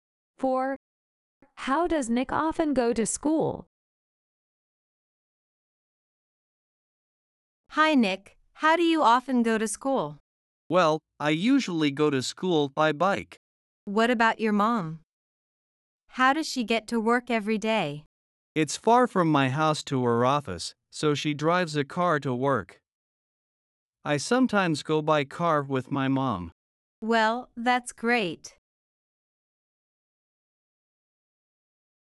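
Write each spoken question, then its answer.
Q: How does Nick often go to school?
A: By bike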